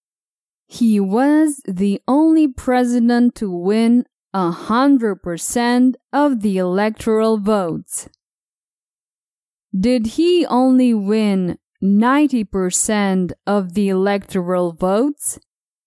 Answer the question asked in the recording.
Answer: No. He didn't only win 90% of the electoral votes.